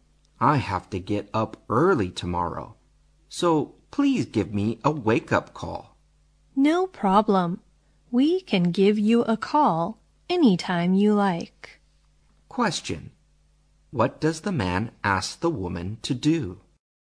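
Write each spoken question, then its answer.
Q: What does the man ask the woman to do?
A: Give him a wake-up call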